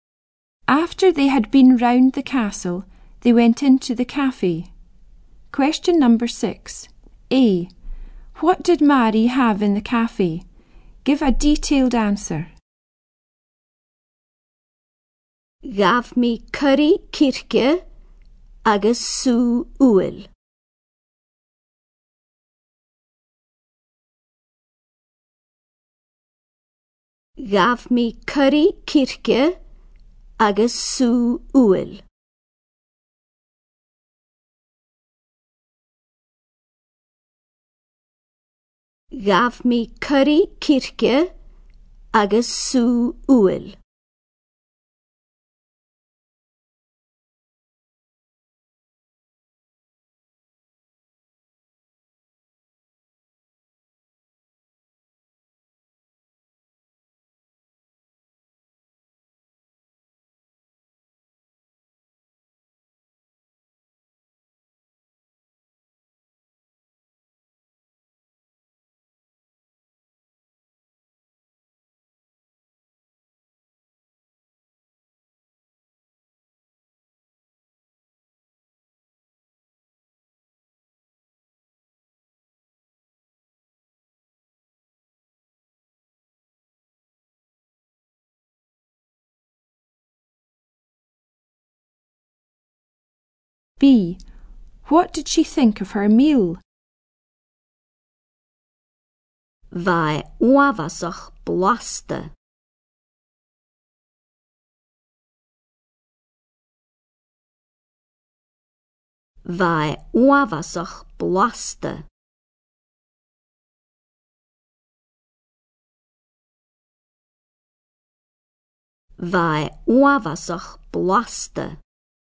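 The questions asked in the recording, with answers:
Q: What did she think of her meal?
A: Very tasty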